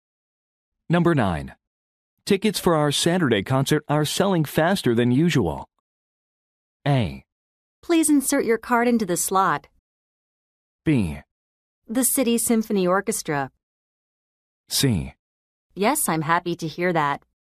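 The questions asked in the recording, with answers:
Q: Tickets for our Saturday concert are selling faster than usual.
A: C: Yes, I'm happy to hear that.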